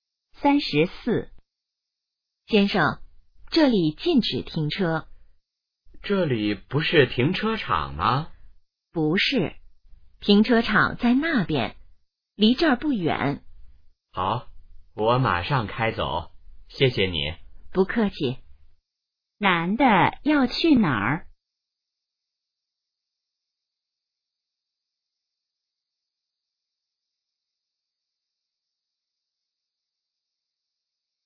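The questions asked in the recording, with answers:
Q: 男的要去哪儿?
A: 停车场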